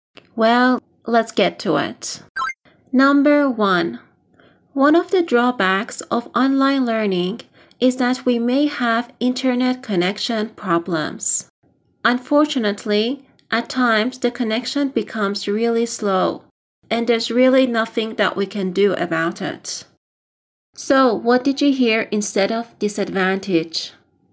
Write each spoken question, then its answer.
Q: So, what did you hear instead of disadvantage?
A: Drawback. Draw back.